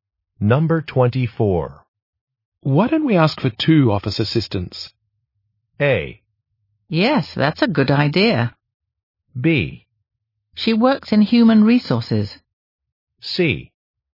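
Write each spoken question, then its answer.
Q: Why don't we ask for two office assistants?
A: A: Yes, that's a good idea.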